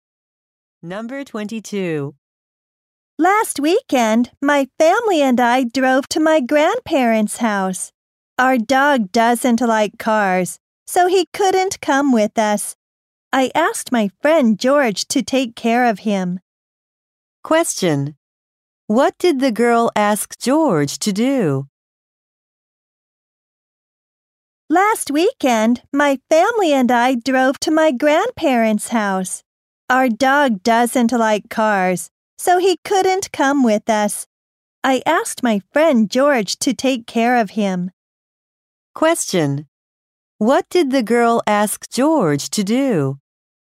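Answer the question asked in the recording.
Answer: Take care of her dog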